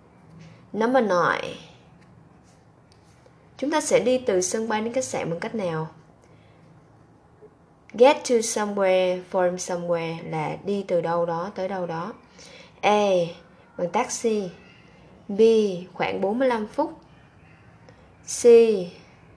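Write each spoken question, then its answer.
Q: Chúng ta sẽ đi từ sân bay đến khách sạn bằng cách nào?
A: A: Bằng taxi.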